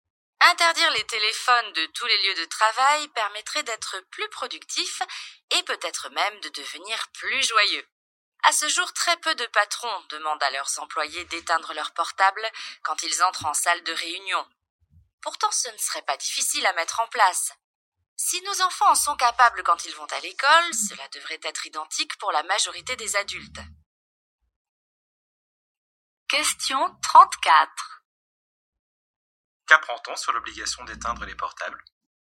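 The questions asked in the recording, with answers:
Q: Qu'apprend-on sur l'obligation d'éteindre les portables?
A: Peu de patrons l'imposent, alors que ce serait facile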